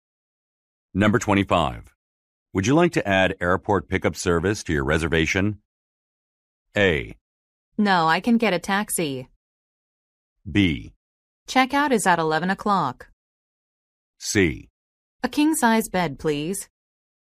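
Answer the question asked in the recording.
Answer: A: No, I can get a taxi.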